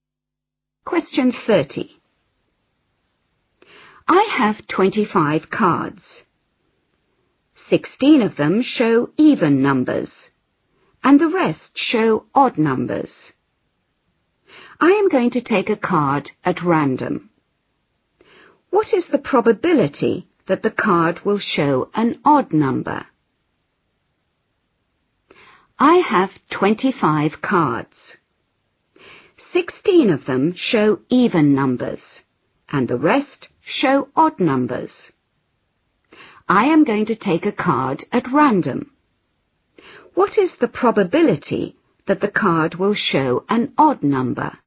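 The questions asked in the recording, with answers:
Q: What is the probability that the card will show an odd number?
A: 9/25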